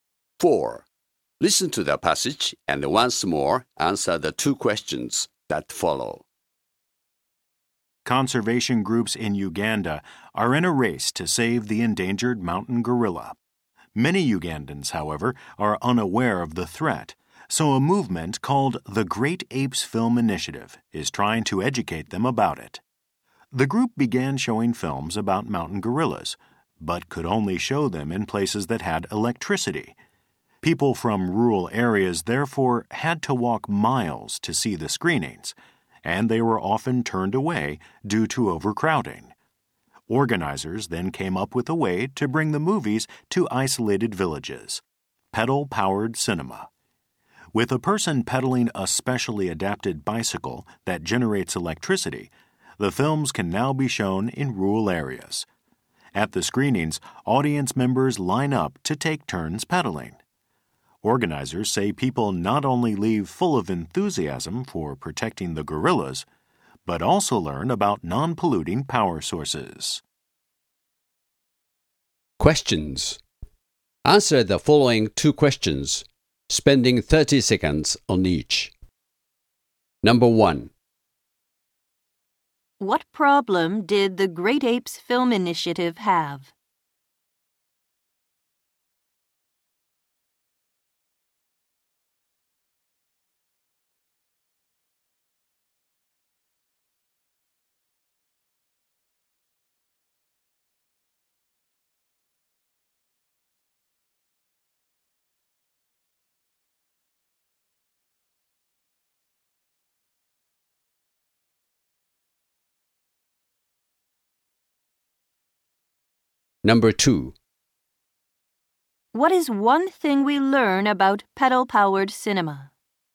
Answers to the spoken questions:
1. Many villages in rural areas were unable to show the film due to a lack of electrical power.
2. It allows audience members to actively participate in the showing of the film.